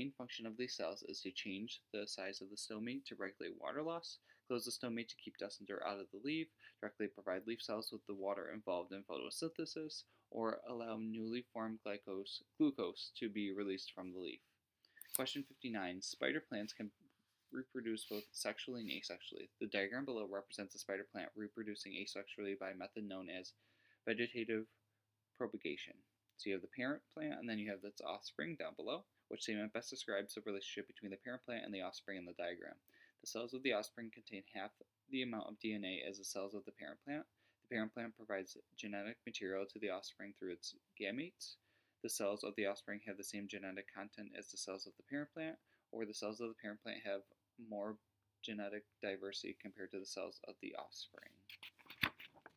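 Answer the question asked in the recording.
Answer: The cells of the offspring have the same genetic content as the cells of the parent plant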